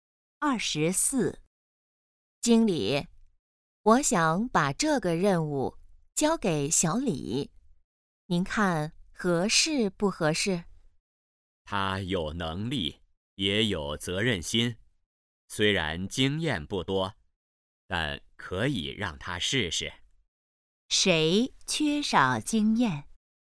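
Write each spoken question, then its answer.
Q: 谁缺少经验?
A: 小李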